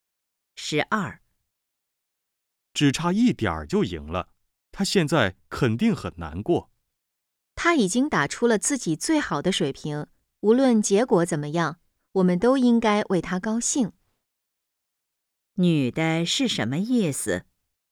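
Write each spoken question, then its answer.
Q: 女的是什么意思?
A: 应该为他高兴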